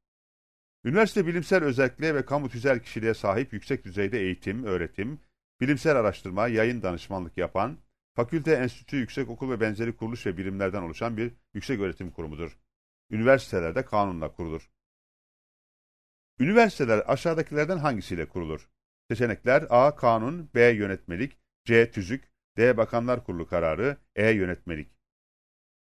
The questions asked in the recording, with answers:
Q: Üniversiteler aşağıdakilerden hangisiyle kurulur?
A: Doğru cevap A seçeneğidir.